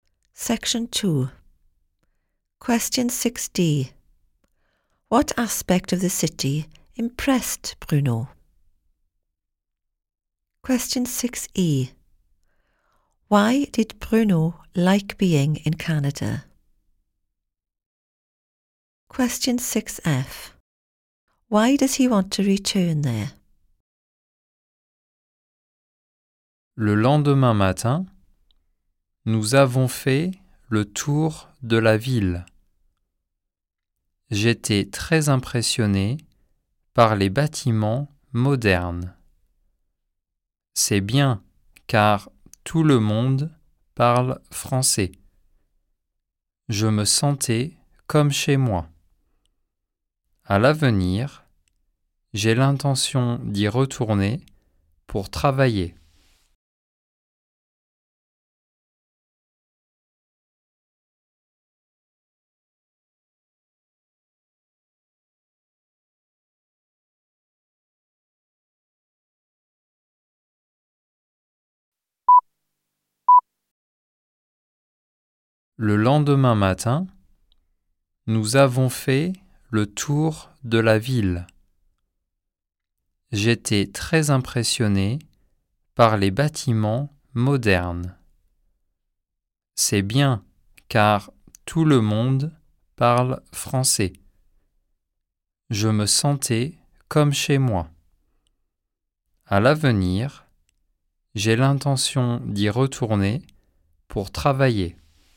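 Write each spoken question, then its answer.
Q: What aspect of the city impressed Bruno?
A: The modern buildings

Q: Why did Bruno like being in Canada?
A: Everyone speaks French; he felt at home

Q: Why does he want to return there?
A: To work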